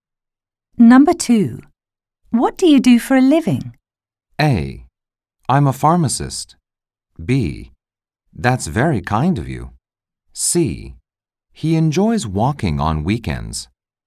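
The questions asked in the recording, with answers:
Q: What do you do for a living?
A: A: I'm a pharmacist.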